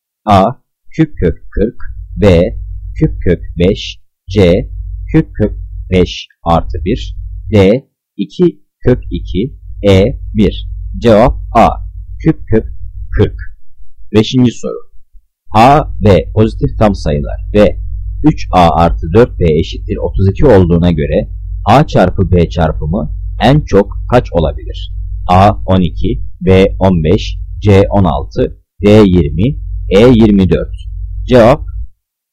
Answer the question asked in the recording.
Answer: Cevap D 20.